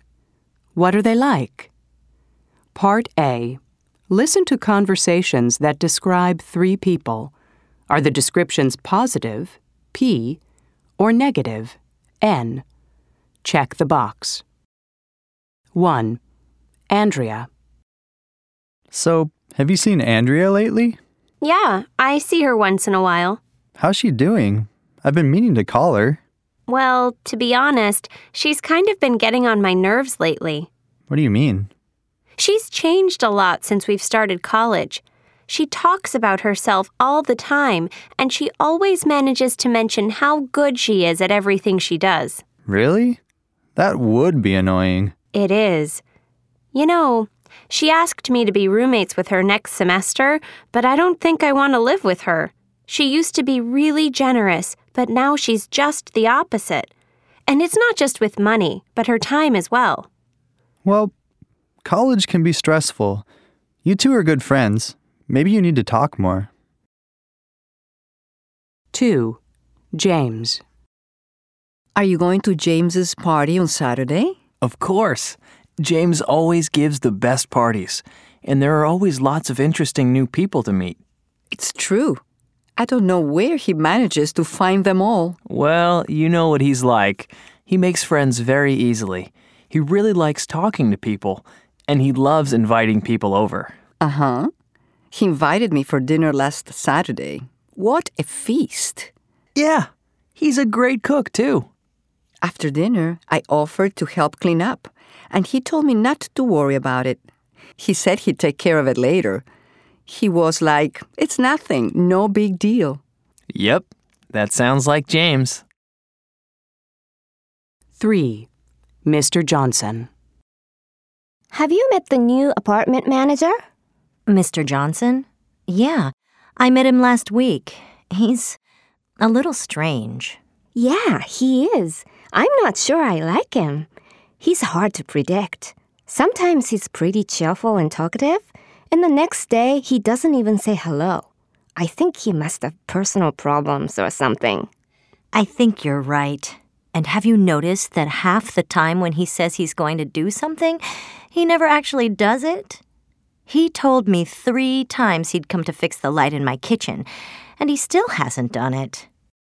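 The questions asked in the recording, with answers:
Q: Andrea.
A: N: negative

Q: James.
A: P: positive

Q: Mr. Johnson.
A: N: negative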